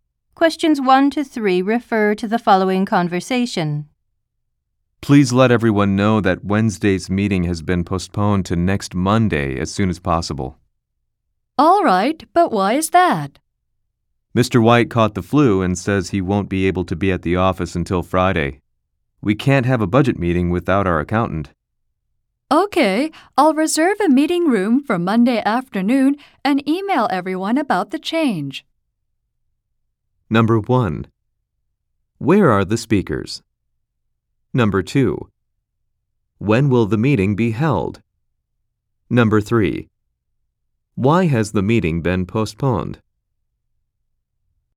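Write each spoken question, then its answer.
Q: When will the meeting be held?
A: Next Monday afternoon

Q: Why has the meeting been postponed?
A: The accountant, Mr. White, has the flu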